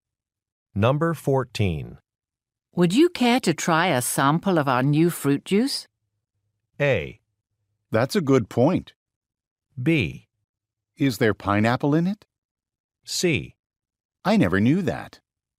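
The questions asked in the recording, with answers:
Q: Would you care to try a sample of our new fruit juice?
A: B: Is there pineapple in it?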